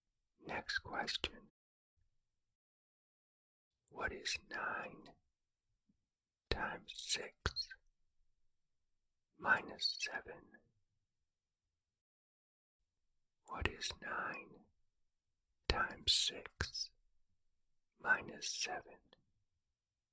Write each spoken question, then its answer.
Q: What is 9 times 6 minus 7?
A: The answer is 47.